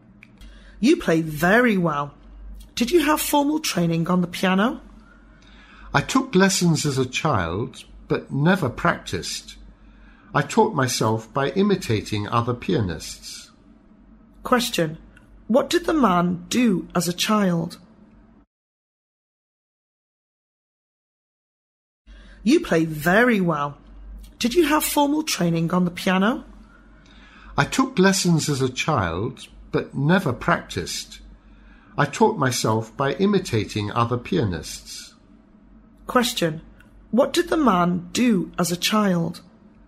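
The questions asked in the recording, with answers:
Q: What did the man do as a child?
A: He took piano lessons but never practiced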